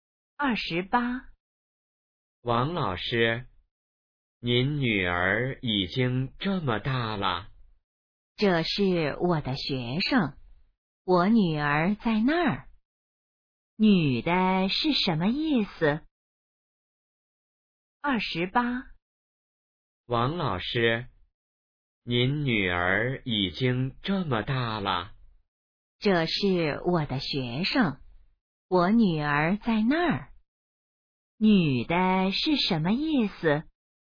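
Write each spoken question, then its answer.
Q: 女的是什么意思?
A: 那是她的学生,不是她女儿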